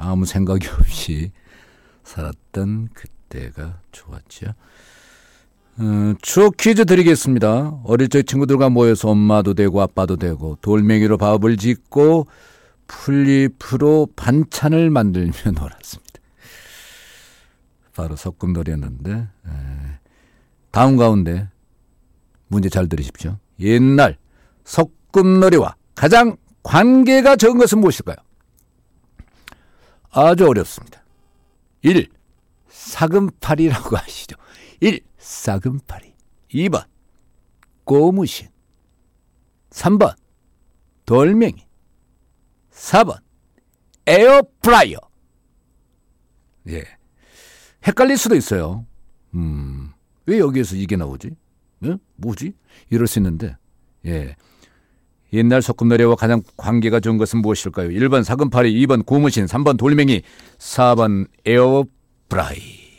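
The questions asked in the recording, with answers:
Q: 옛날 소꿉놀이와 가장 관계가 적은 것은 무엇일까요?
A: 4번: 에어프라이어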